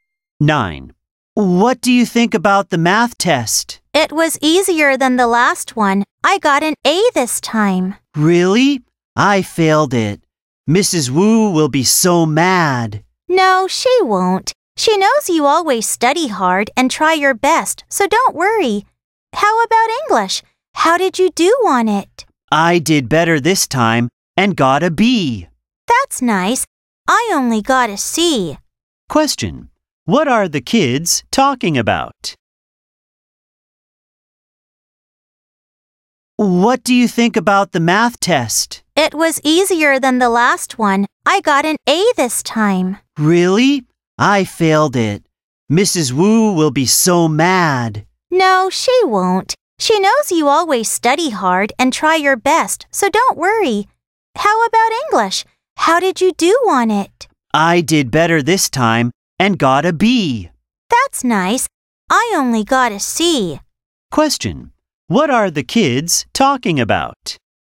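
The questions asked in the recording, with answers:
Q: What are the kids talking about?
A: Their test results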